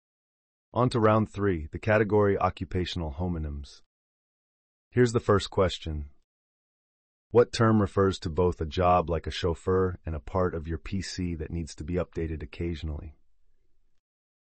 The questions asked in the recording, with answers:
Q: What term refers to both a job like a chauffeur and a part of your PC that needs to be updated occasionally?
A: The answer is a driver.